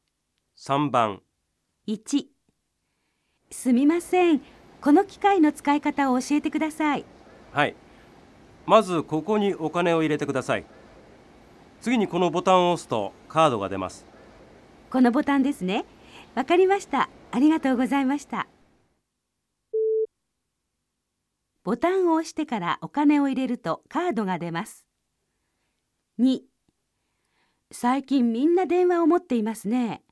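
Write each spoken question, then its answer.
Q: ボタンを押してからお金を入れるとカードが出ます。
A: ×(お金を入れてからボタンを押す)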